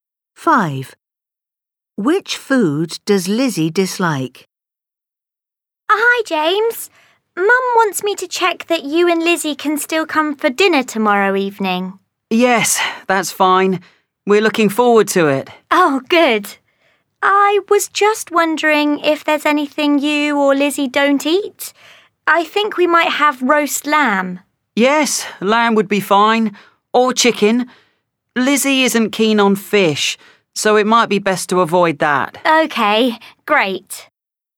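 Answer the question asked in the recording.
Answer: fish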